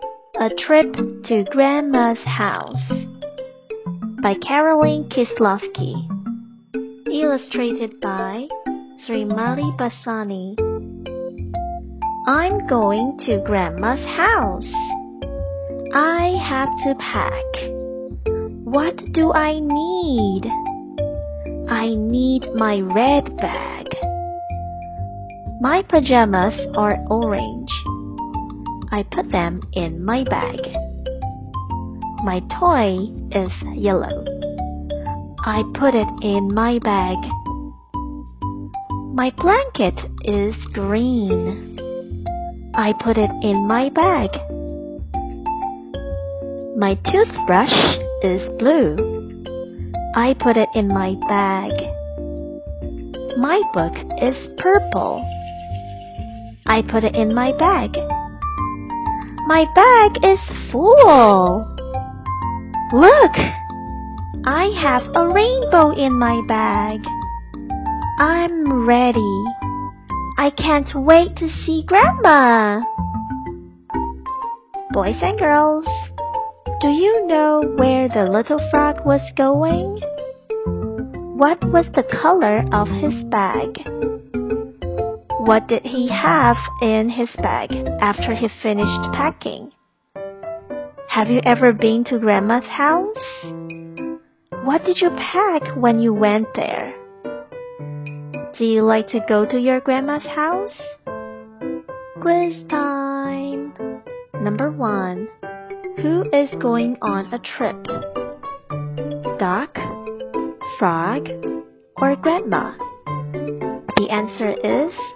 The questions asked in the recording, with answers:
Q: Who is going on a trip?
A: The answer is the frog.